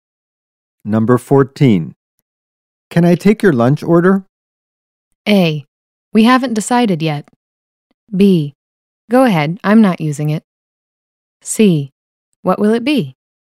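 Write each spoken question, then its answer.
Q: Can I take your lunch order?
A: A: We haven't decided yet.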